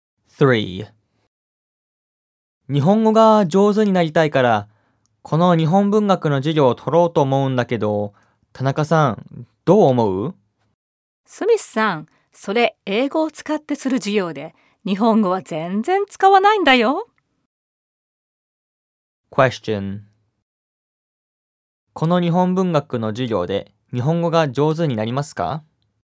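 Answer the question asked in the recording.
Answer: 上手にならないはずです。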